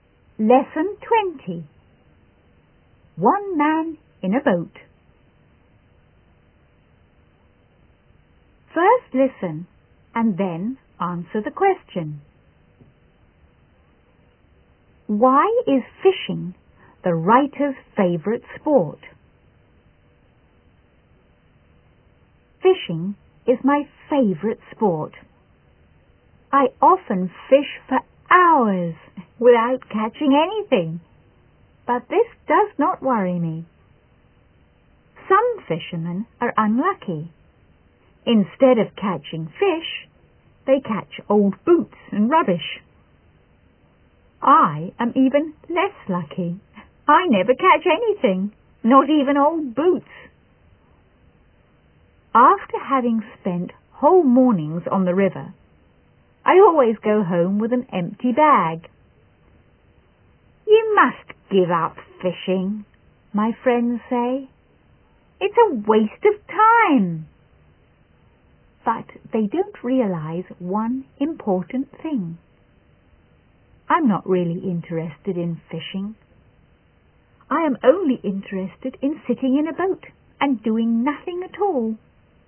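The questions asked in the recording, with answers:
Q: Why is fishing the writer's favourite sport?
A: Because he can sit in a boat and do nothing at all.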